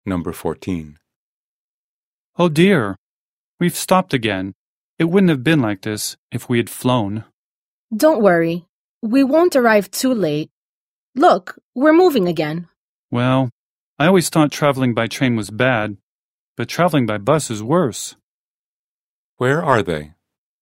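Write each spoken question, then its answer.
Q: Where are they?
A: On a bus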